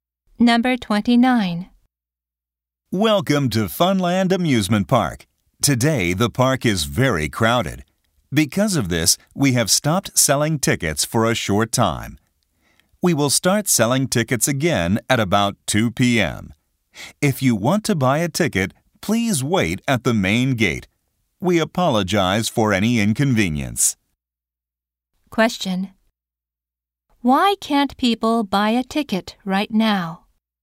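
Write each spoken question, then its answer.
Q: Why can't people buy a ticket right now?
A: Because the park is very crowded.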